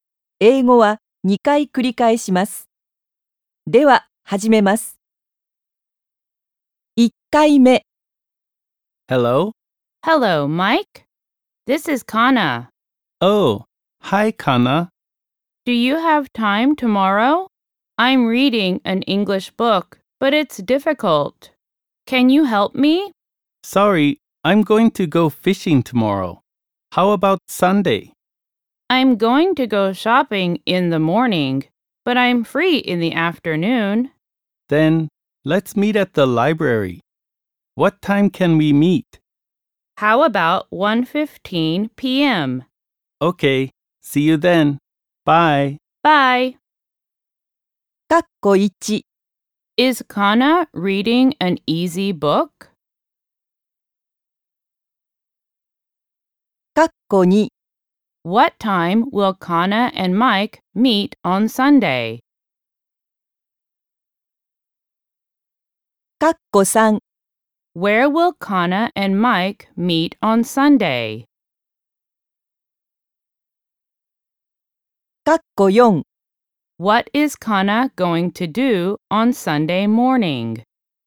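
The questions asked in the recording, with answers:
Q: Is Kana reading an easy book?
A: No, it's difficult.

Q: What time will Kana and Mike meet on Sunday?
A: At 1:15 p.m.

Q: Where will Kana and Mike meet on Sunday?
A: At the library.

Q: What is Kana going to do on Sunday morning?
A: She is going to go shopping.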